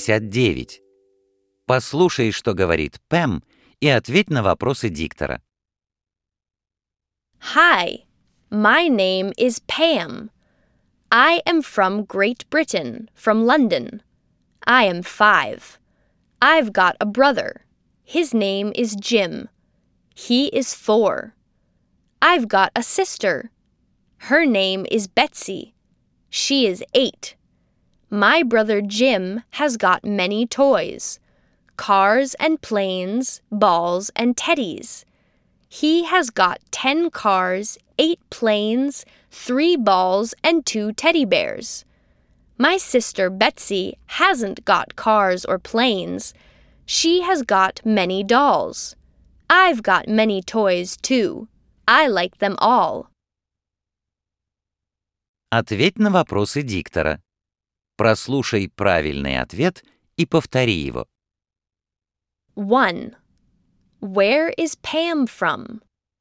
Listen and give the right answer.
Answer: She is from Great Britain.